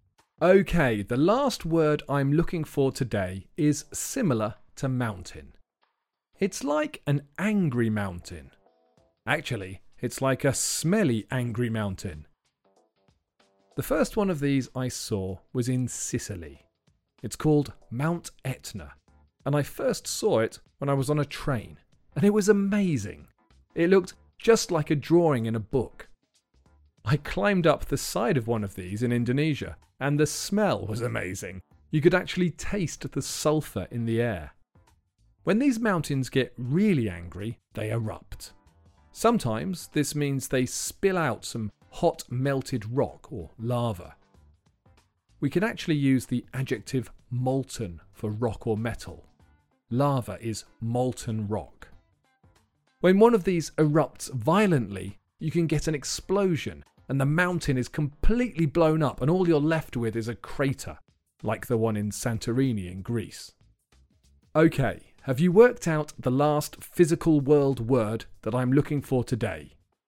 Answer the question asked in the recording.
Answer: The answer is volcano.